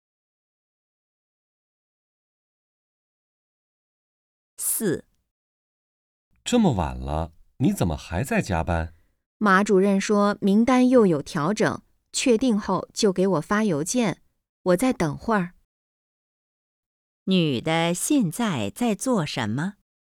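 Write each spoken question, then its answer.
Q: 女的现在在做什么?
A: 加班等邮件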